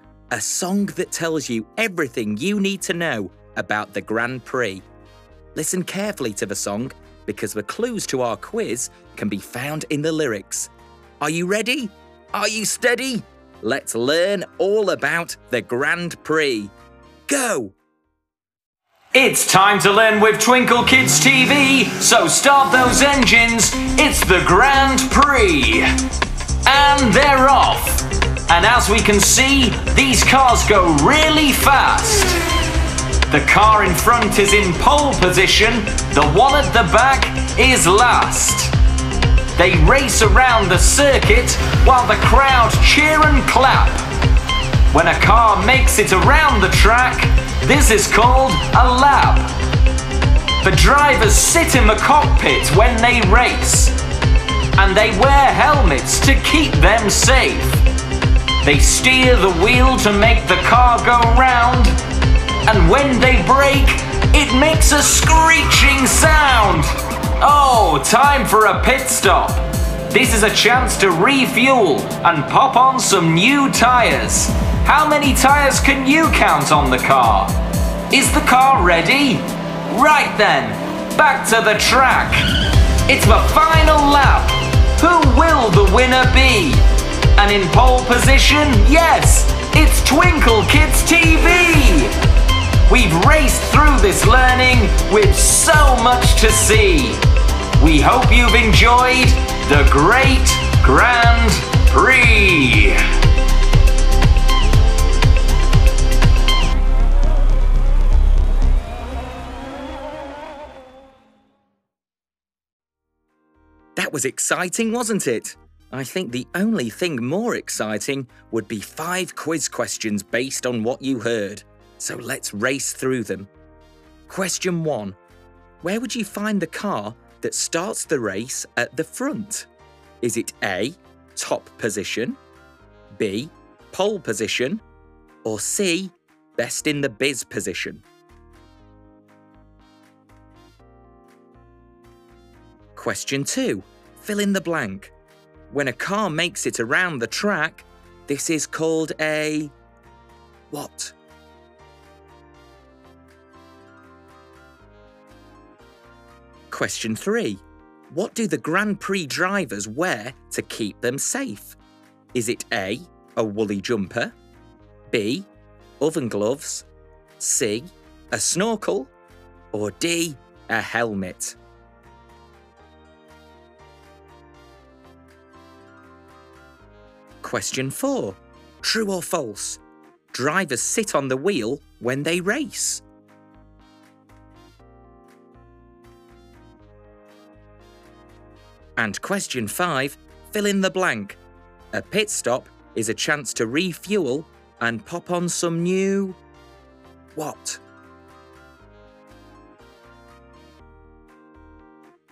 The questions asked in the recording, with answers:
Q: Where would you find the car that starts the race at the front?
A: The answer is B. Pole position is the name given to the car that begins the Grand Prix at the front.

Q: When a car makes it around the track, this is called a...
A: When a car makes it around the track, this is called a lap.

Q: What do the Grand Prix drivers wear to keep them safe?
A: So the answer is D, helmet.

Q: Drivers sit on the wheel when they race.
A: The answer is false. The drivers sit in the cockpit.

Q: A pit stop is a chance to refuel and pop on some new...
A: A pit stop is a chance to refuel and pop on some new tyres.